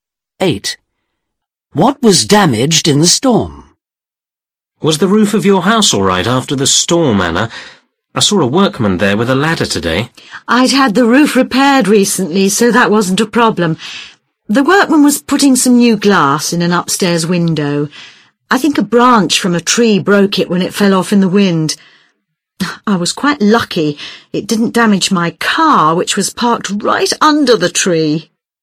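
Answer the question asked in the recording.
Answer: An upstairs window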